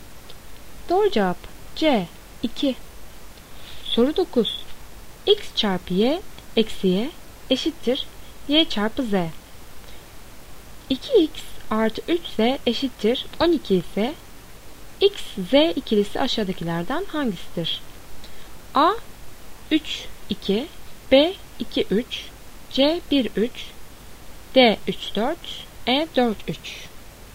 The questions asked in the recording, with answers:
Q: 2x artı 3z eşittir 12 ise x, z ikilisi aşağıdakilerden hangisidir?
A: Doğru cevap A 3, 2.